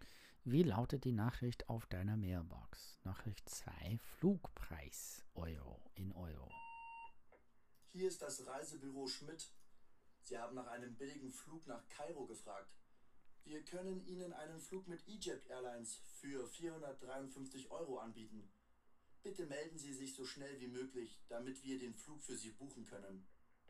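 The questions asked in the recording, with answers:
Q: Nachricht 2, Flugpreis Euro in Euro.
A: 453 Euro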